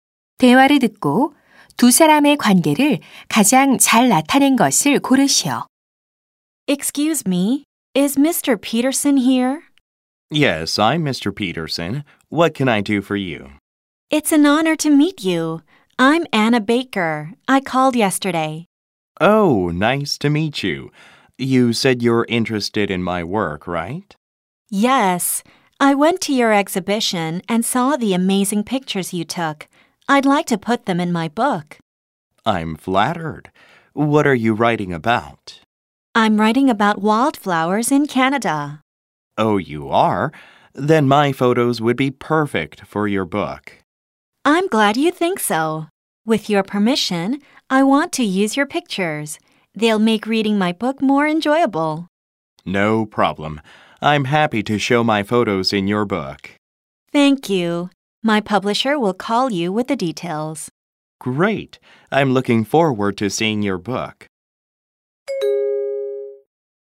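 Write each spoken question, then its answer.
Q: 대화를 듣고 두 사람의 관계를 가장 잘 나타낸 것을 고르시오.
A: 사진작가 — 작가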